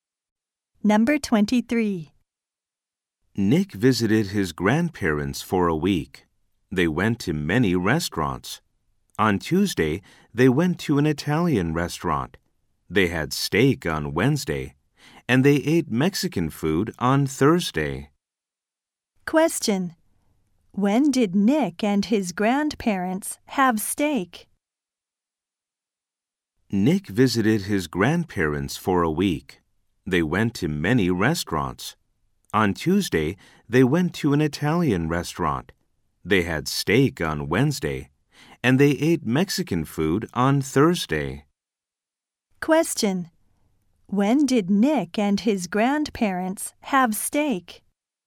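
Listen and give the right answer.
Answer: On Wednesday.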